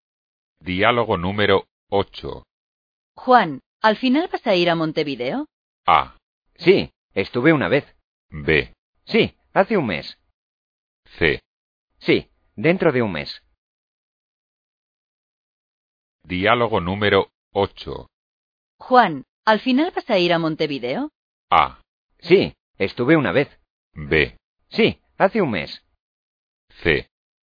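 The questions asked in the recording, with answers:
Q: Juan, ¿al final vas a ir a Montevideo?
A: C: Sí, dentro de un mes.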